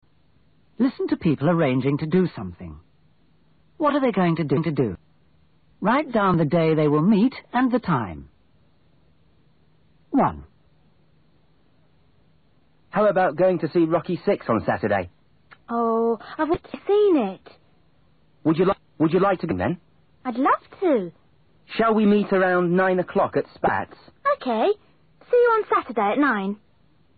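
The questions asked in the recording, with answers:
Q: What are they going to do?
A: See Rocky Six, Saturday at 9 o'clock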